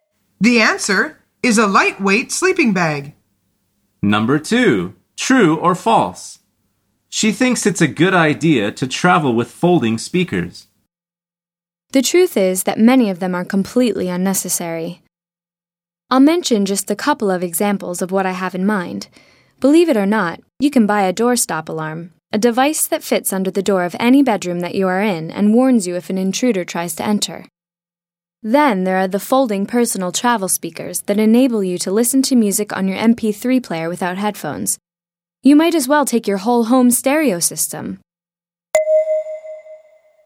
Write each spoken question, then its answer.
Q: True or false? She thinks it's a good idea to travel with folding speakers.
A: The answer is false.